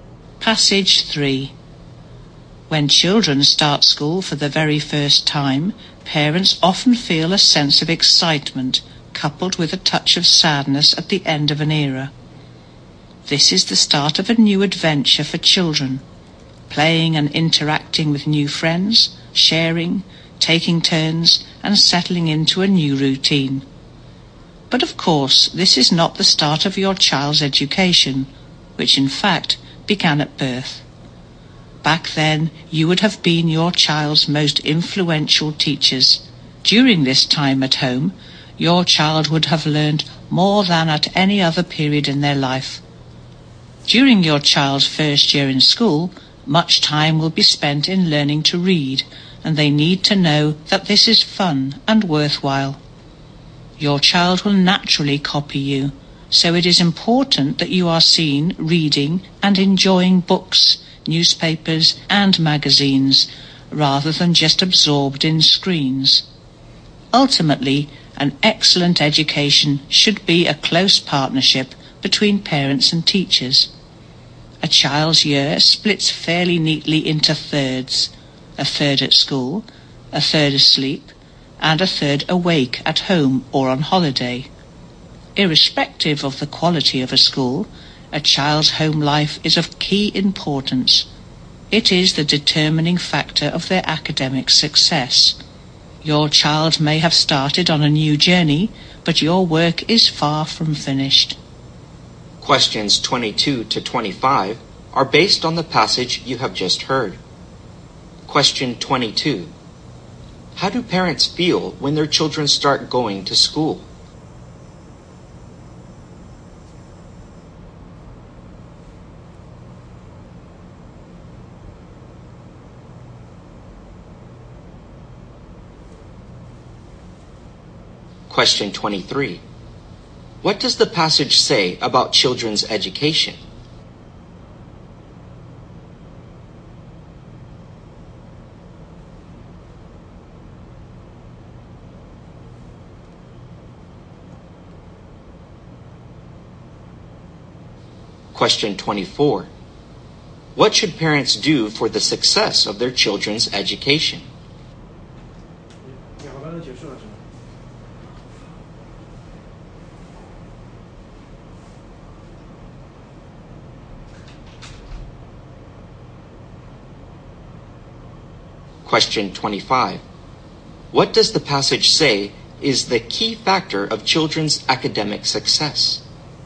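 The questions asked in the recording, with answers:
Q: How do parents feel when their children start going to school?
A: Excited, with a touch of sadness

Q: What does the passage say about children's education?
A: It begins at birth

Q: What does the passage say is the key factor of children's academic success?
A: The child's home life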